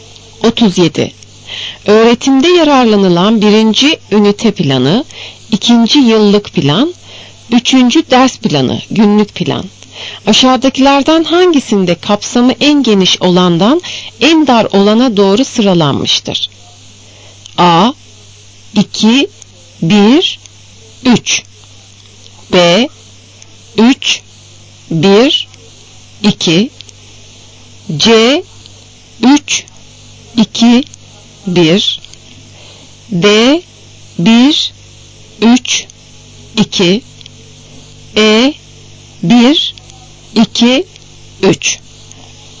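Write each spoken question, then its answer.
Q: Aşağıdakilerden hangisinde kapsamı en geniş olandan en dar olana doğru sıralanmıştır?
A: A: 2, 1, 3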